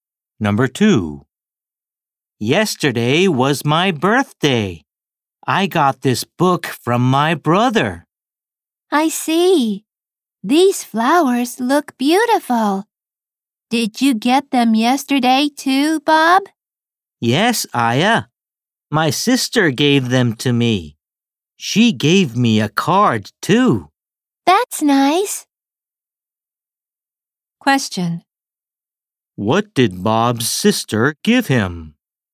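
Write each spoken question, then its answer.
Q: What did Bob's sister give him?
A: Flowers and a card.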